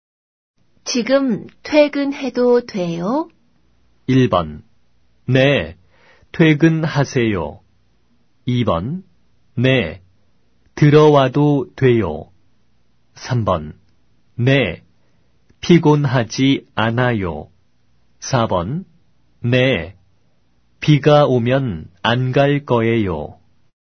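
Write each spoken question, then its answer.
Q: 지금 퇴근해도 돼요?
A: 1: 네, 퇴근하세요.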